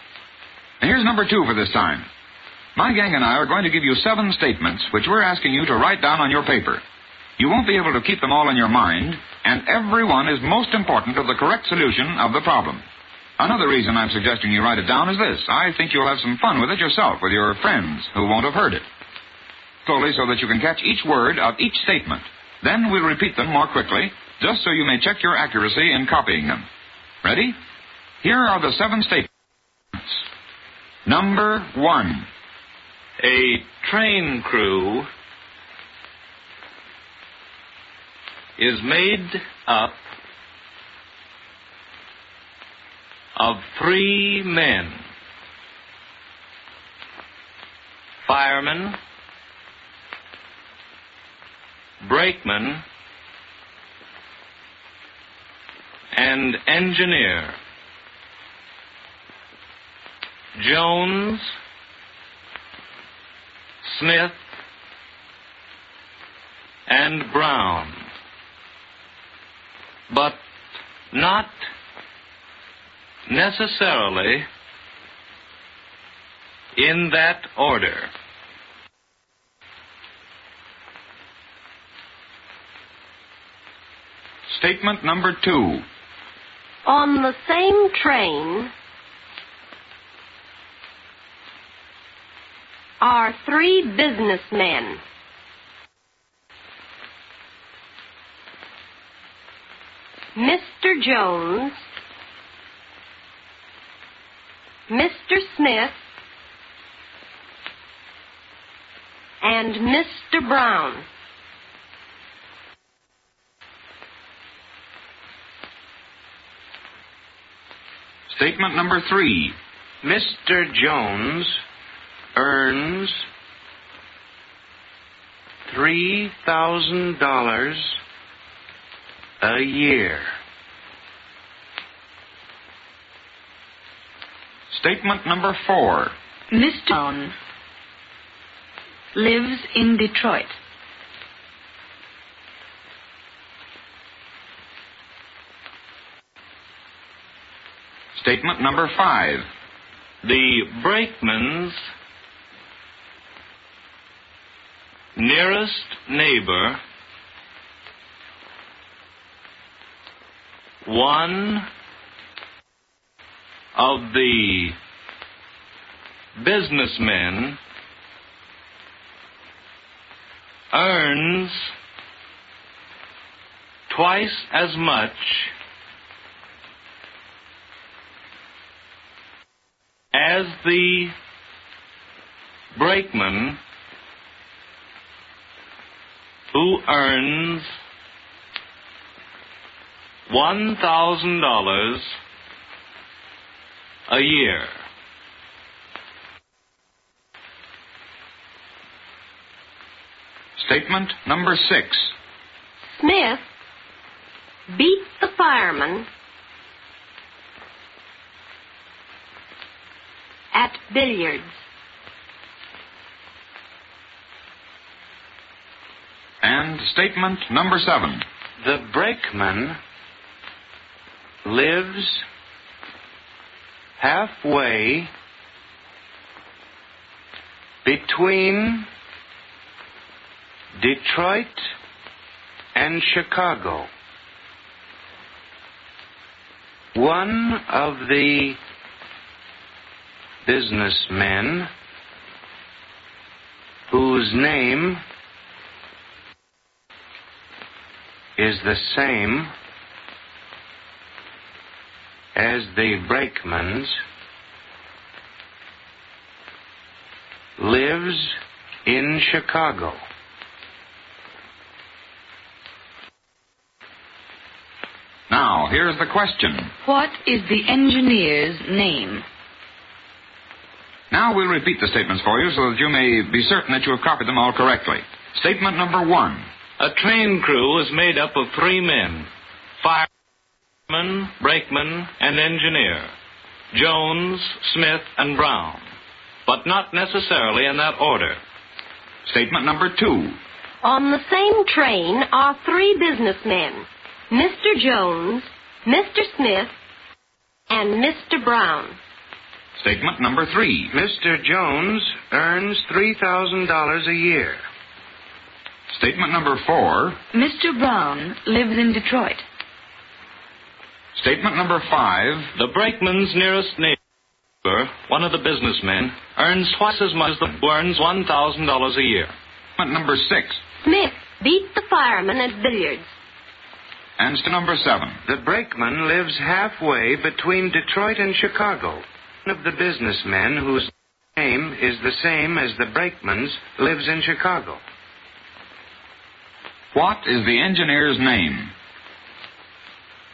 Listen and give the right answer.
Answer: Smith.